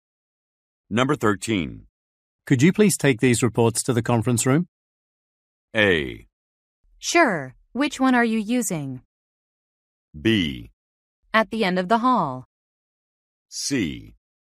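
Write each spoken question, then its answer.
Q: Could you please take these reports to the conference room?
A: A: Sure. Which one are you using?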